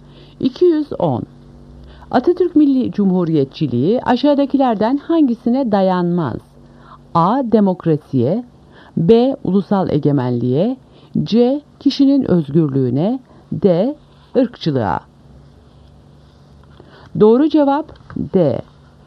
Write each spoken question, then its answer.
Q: Atatürk Milli Cumhuriyetçiliği aşağıdakilerden hangisine dayanmaz?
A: Doğru cevap D. Irkçılığa.